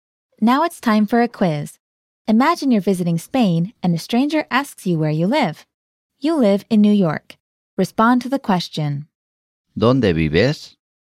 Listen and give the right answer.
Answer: Vivo en Nueva York.